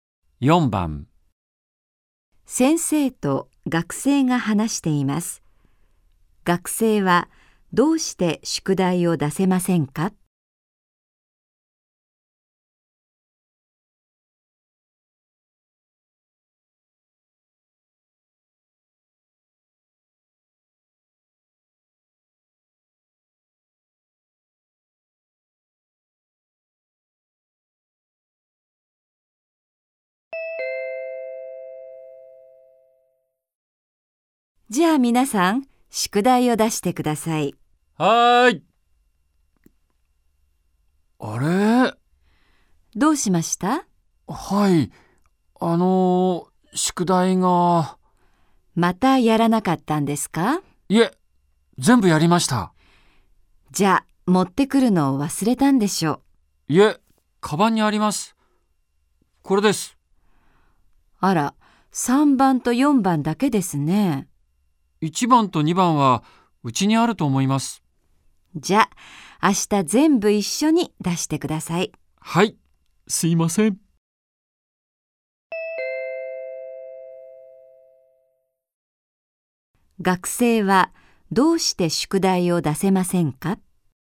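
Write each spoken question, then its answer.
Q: 学生はどうして宿題を出せませんか?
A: 宿題の一部(1番と2番)をうちに忘れてきたから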